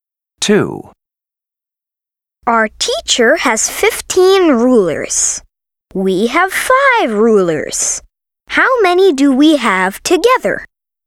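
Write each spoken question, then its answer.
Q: How many do we have together?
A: 20 rulers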